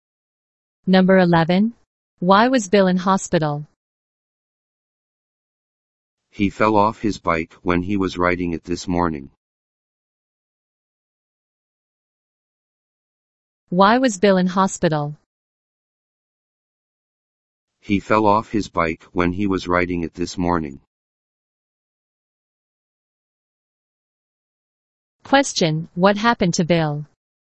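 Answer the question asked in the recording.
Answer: He fell off his bike while riding it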